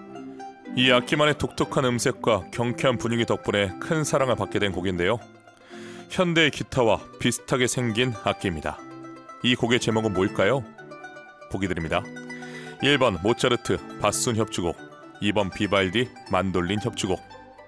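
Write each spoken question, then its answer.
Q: 이 곡의 제목은 뭘까요?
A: 2번: 비발디 만돌린 협주곡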